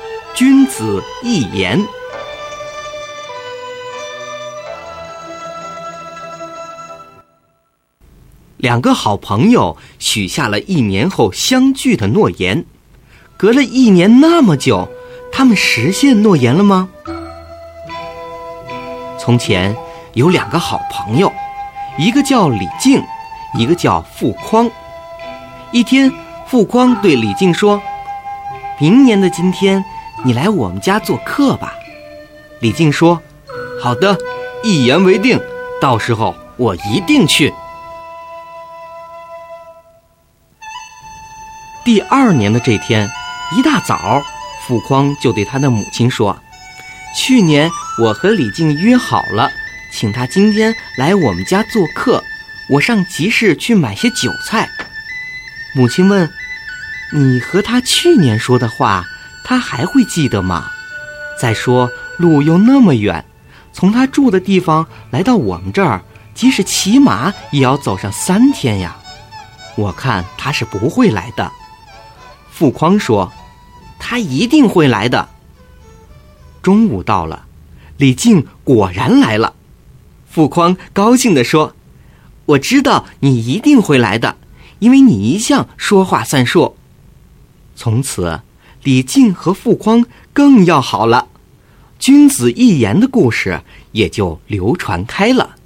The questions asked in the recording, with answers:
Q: 两个好朋友许下了一年后相聚的诺言,隔了一年那么久,他们实现诺言了吗?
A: 虽然时间长,路途遥远,但李靖仍然按时赴约了